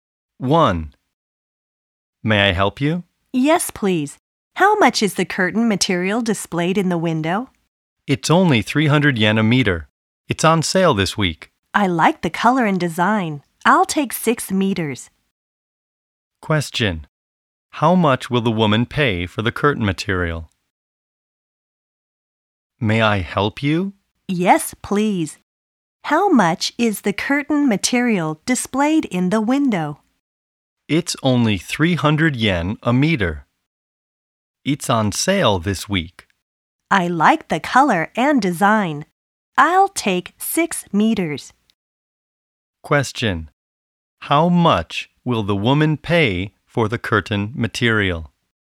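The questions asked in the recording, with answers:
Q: How much will the woman pay for the curtain material?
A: 1,800 yen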